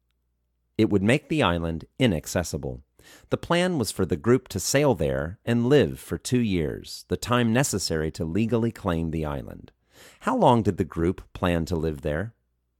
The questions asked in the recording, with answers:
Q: How long did the group plan to live there?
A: The group planned to live there for 2 years.